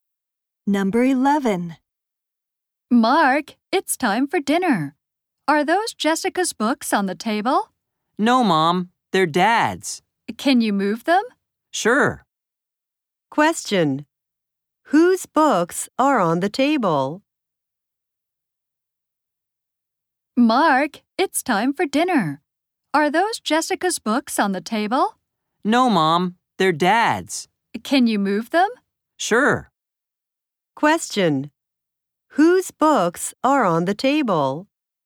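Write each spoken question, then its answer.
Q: Whose books are on the table?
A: Dad's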